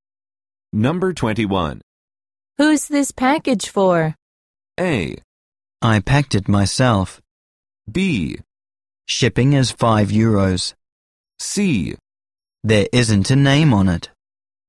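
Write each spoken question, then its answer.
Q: Who's this package for?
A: C: There isn't a name on it.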